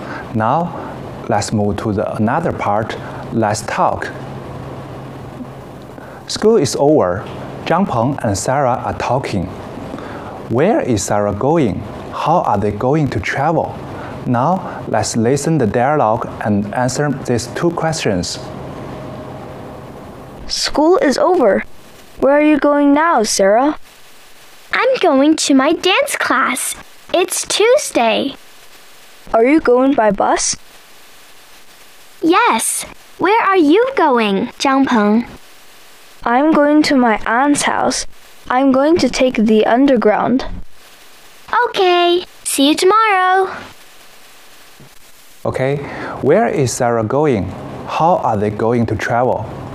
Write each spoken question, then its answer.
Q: Where is Sarah going?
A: She's going to her dance class.

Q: How are they going to travel?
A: Sarah is going by bus. Zhang Peng is going to take the underground.